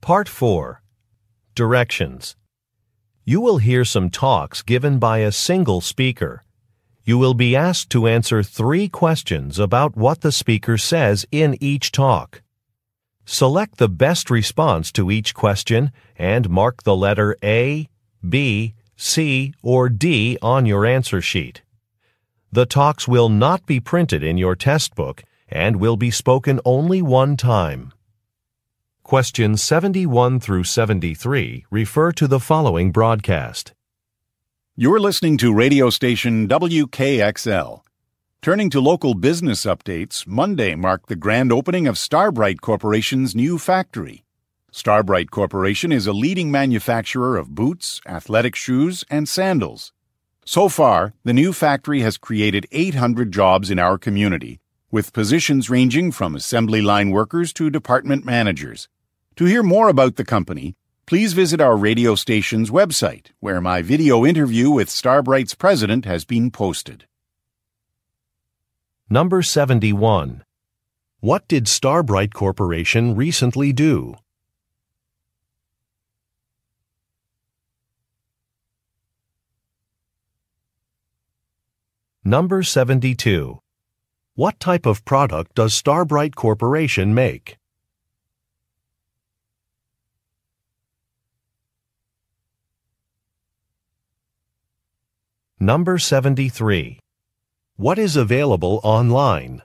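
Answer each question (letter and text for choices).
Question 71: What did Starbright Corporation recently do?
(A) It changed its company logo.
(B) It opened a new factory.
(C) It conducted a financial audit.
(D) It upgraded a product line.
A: (B) It opened a new factory.

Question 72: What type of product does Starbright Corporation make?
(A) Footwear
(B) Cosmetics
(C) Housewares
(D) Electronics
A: (A) Footwear

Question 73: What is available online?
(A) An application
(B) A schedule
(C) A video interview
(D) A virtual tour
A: (C) A video interview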